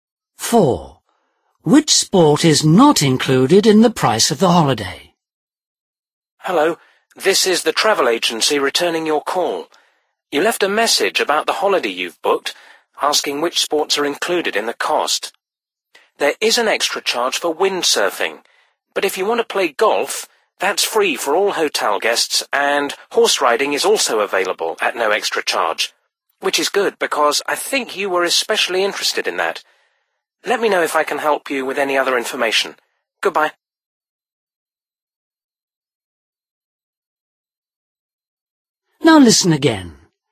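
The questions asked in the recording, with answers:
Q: Which sport is not included in the price of the holiday?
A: Windsurfing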